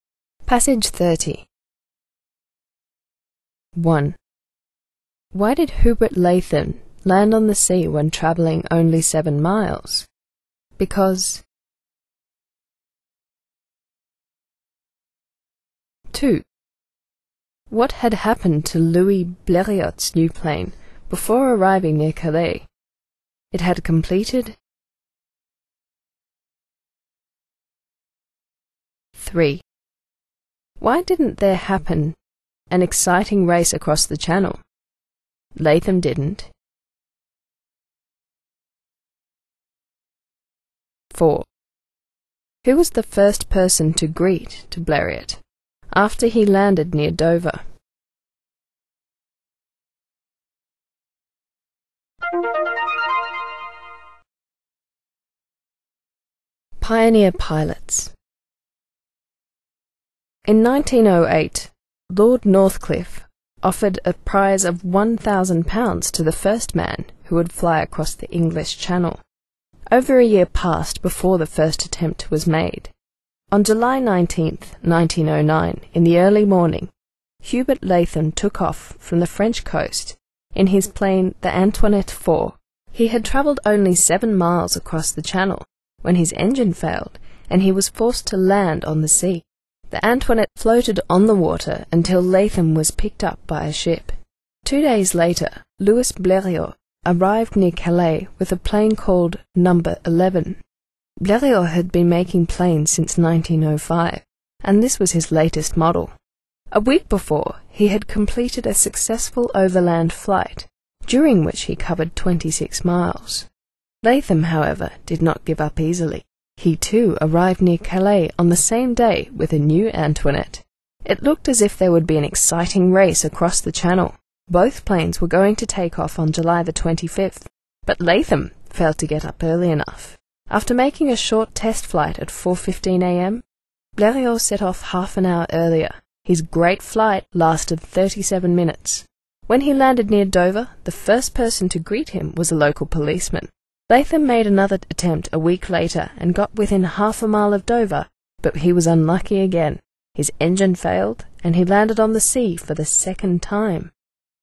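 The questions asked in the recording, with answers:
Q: Why did Hubert Latham land on the sea when travelling only 7 miles?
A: Because his engine failed.

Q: What had happened to Louis Bleriot's new plane before arriving near Calais?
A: It had completed a successful overland flight of 26 miles a week before.

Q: Why didn't there happen an exciting race across the channel?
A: Latham didn't get up early enough.

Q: Who was the first person to greet to Bleriot after he landed near Dover?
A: A local policeman.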